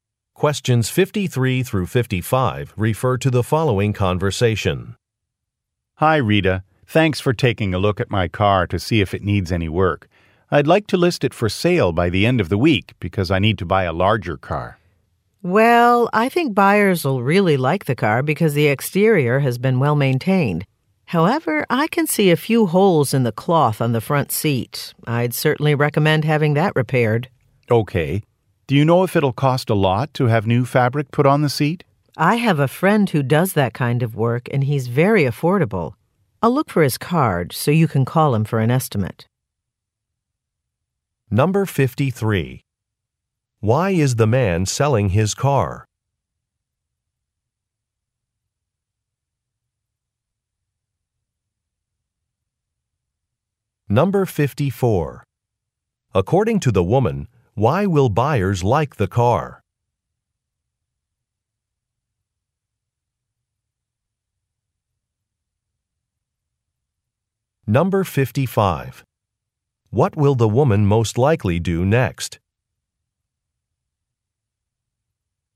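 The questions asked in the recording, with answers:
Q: Why is the man selling his car?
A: He needs a larger car

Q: According to the woman, why will buyers like the car?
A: The exterior is well maintained

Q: What will the woman most likely do next?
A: Look for her friend's business card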